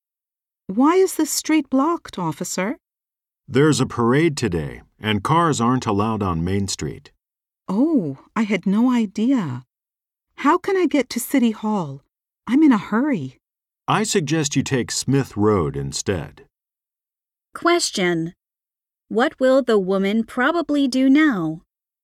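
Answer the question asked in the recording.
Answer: Take Smith Road to City Hall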